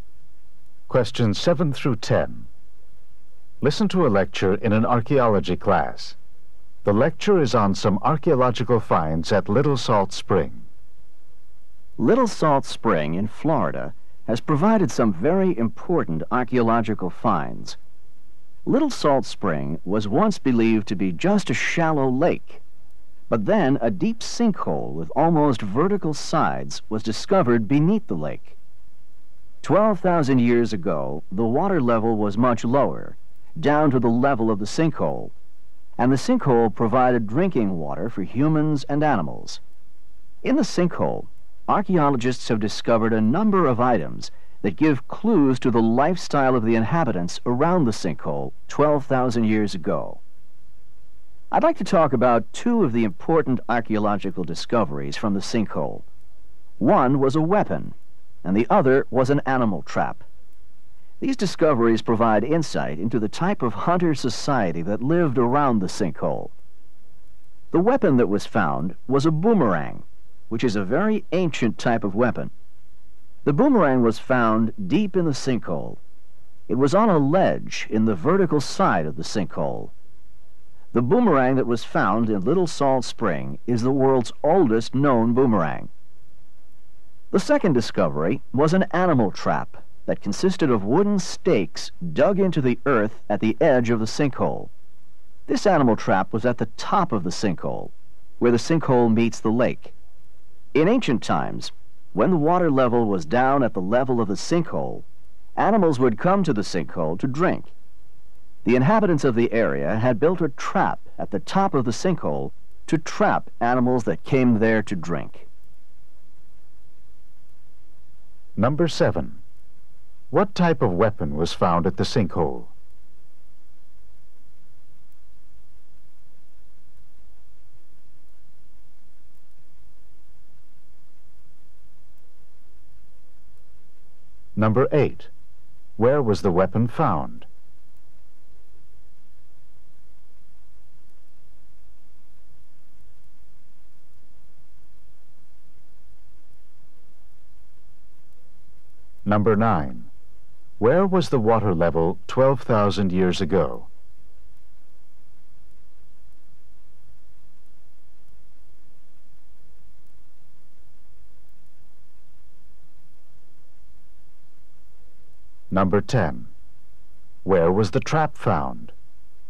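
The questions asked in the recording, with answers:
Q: What type of weapon was found at the sinkhole?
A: A boomerang

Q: Where was the weapon found?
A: On a ledge in the vertical side of the sinkhole, deep down

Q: Where was the water level 12,000 years ago?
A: Much lower, down at the level of the sinkhole

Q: Where was the trap found?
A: At the top of the sinkhole, where it meets the lake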